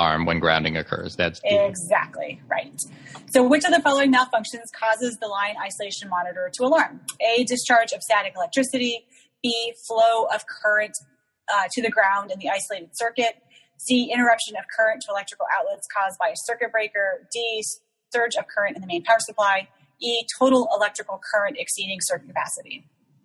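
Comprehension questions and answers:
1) Which of following causes LIM to alarm?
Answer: Flow of current to ground in isolating circuit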